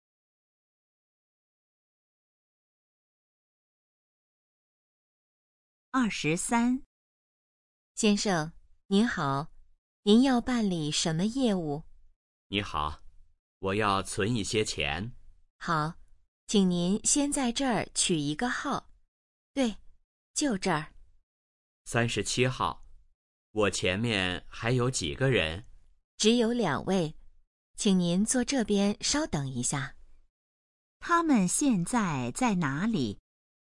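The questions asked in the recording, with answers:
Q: 他们现在在哪里?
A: 银行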